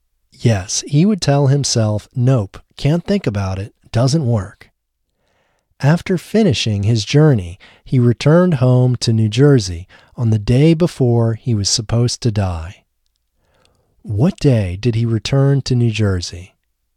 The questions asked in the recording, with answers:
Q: What day did he return to New Jersey?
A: He returned home to New Jersey on the day before he was supposed to die.